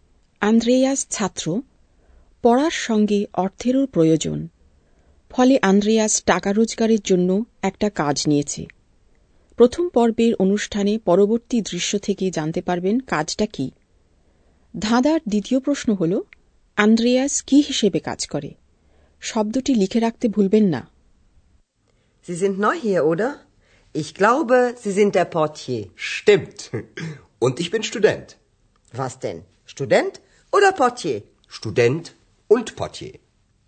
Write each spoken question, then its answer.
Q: আন্দ্রেয়াস কি হিসেবে কাজ করে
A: পটিয়ে অর্থাৎ receptionist হিসেবে কাজ করে